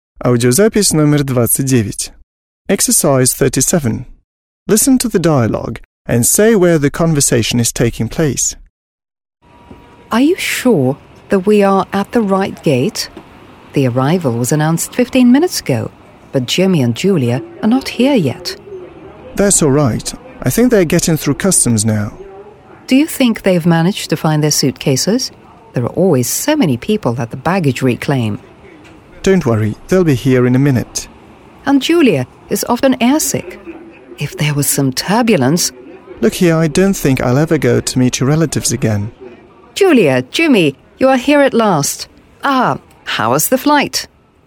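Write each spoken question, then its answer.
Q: Listen to the dialogue and say where the conversation is taking place.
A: At the airport (arrivals gate)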